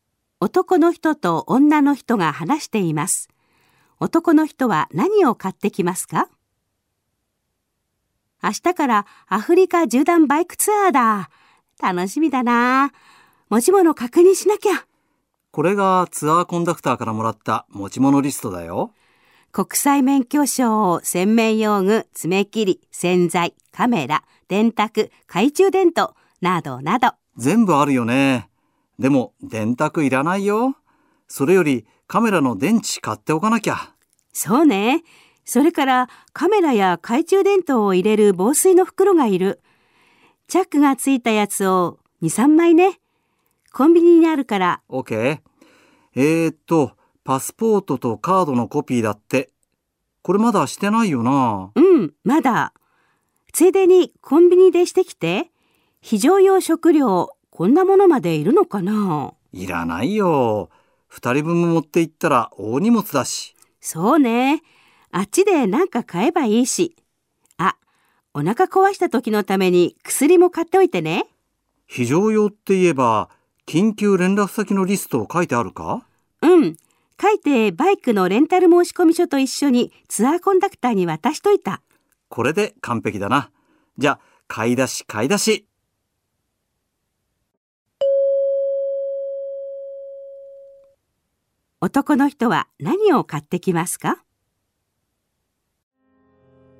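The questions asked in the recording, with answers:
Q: 男の人は何を買ってきますか?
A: カメラの電池、チャック付きの防水の袋(2、3枚)、お腹の薬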